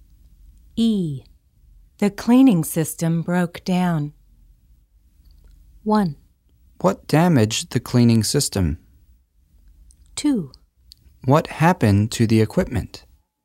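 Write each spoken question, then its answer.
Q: The cleaning system broke down.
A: 2: What happened to the equipment?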